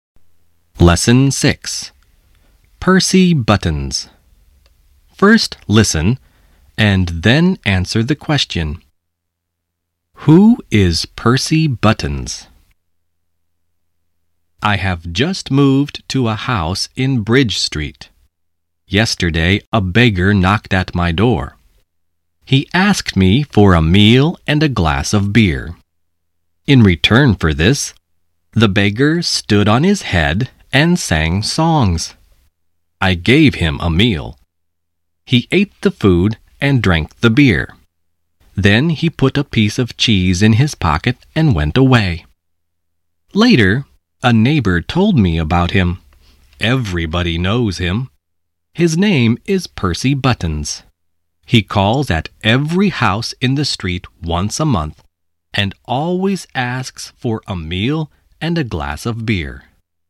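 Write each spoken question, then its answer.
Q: Who is Percy Buttons?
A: A beggar who calls at every house in the street once a month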